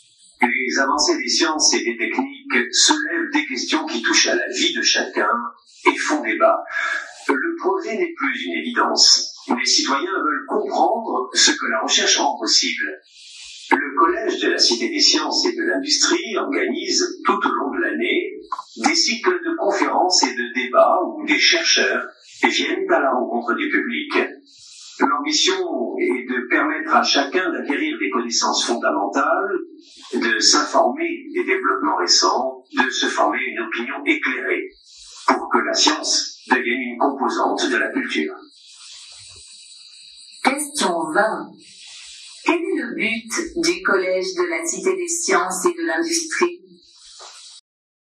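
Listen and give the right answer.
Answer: Permettre à chacun d'acquérir des connaissances scientifiques et de se former une opinion éclairée, pour que la science fasse partie de la culture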